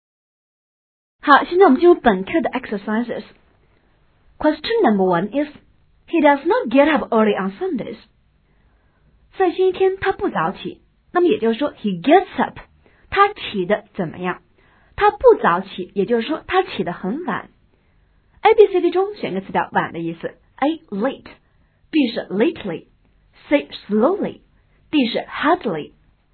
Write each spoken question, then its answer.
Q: he does not get up early on Sundays. 在星期天他不早起,那么也就是说 he gets up, 他起得怎么样?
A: 答案应该是 A, he gets up late